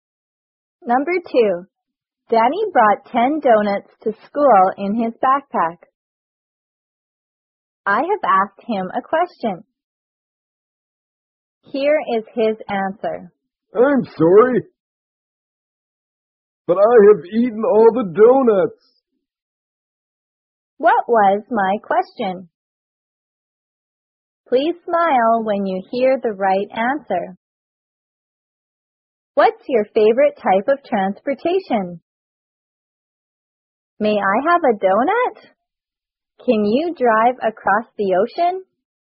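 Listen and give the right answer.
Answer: May I have a donut?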